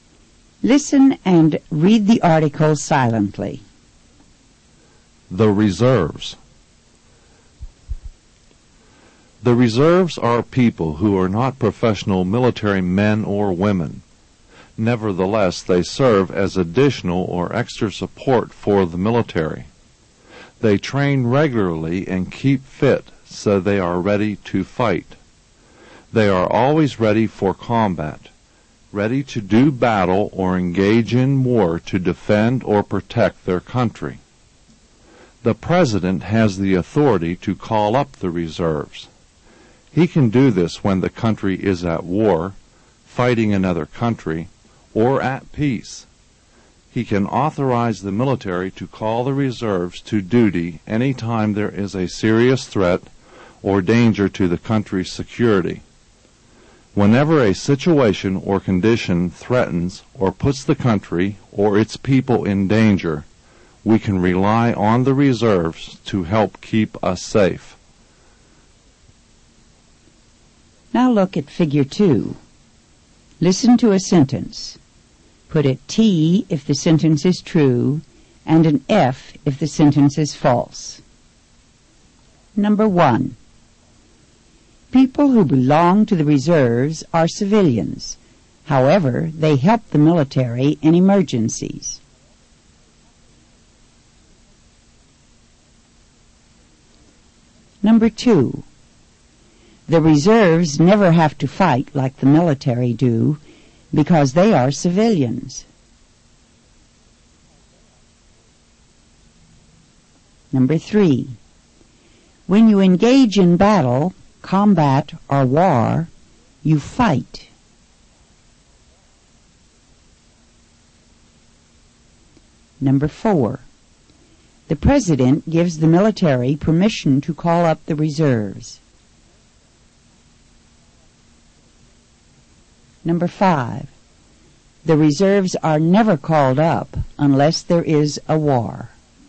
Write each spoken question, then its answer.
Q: People who belong to the reserves are civilians. However, they help the military in emergencies.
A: Number 1 is true.

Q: The reserves never have to fight like the military do because they are civilians.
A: Number 2 is false.

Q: When you engage in battle, combat or war, you fight.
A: Number three is true.

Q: The president gives the military permission to call up the reserves.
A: Number four is true.

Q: The reserves are never called up unless there is a war.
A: Number five is false.